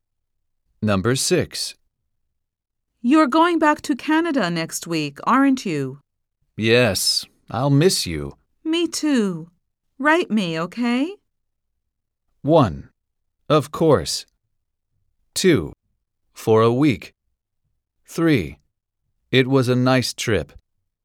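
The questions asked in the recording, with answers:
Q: Me too. Write me, okay?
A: 1: Of course.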